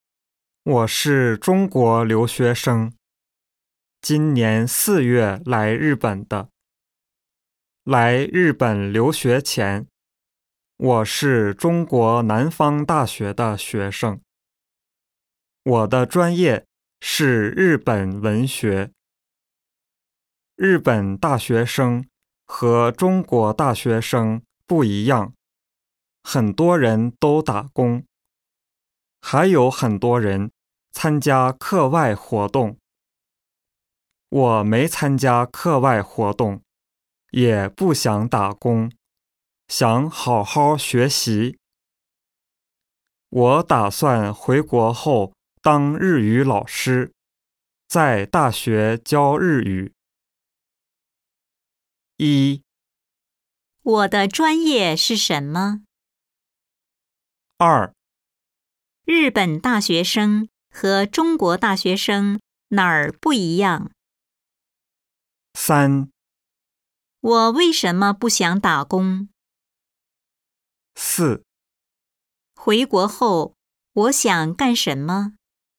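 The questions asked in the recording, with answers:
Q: 我的专业是什么?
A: 日本文学

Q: 日本大学生和中国大学生哪儿不一样?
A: 很多日本大学生打工,还有很多人参加课外活动

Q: 我为什么不想打工?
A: 想好好学习

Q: 回国后,我想干什么?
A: 当日语老师,在大学教日语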